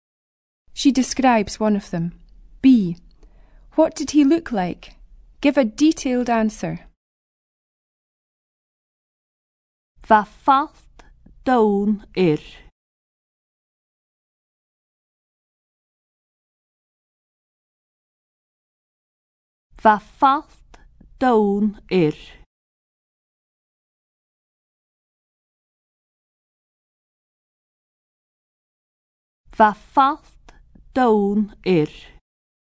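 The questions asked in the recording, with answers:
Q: What did he look like?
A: He had brown hair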